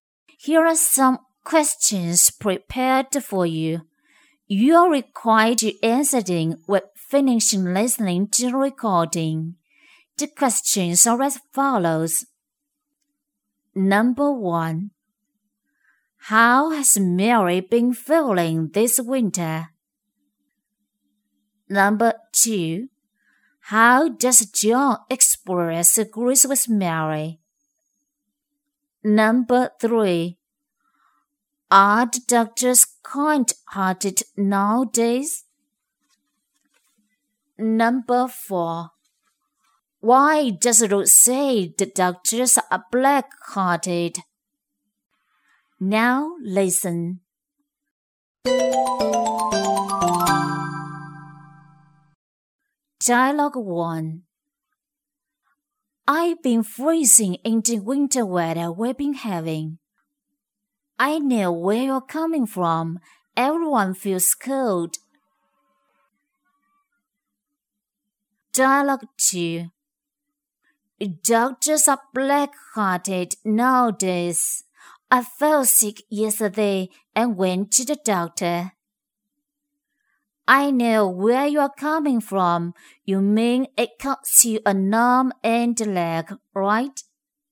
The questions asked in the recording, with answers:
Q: How has Mary been feeling this winter?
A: Mary has been feeling freezing this winter.

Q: How does John express agrees with Mary?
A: He agrees with Mary by saying, I know where you are coming from.

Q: Are the doctors kind-hearted nowadays?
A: No, they aren't.

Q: Why does Ruth say the doctors are black-hearted?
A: Because those medical costs are very expensive.